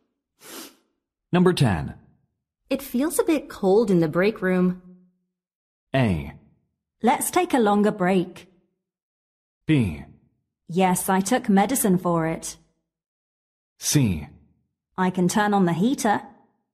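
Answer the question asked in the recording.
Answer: C: I can turn on the heater.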